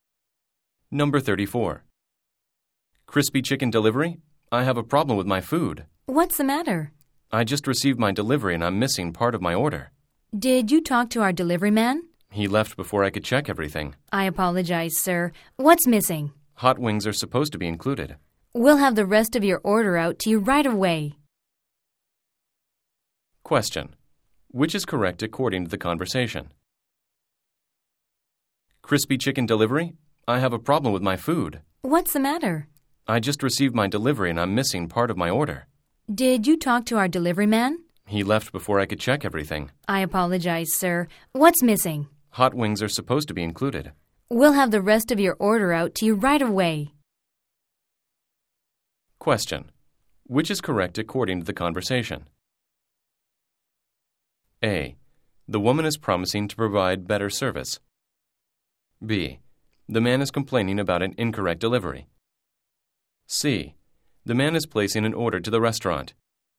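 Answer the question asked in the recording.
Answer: B: The man is complaining about an incorrect delivery.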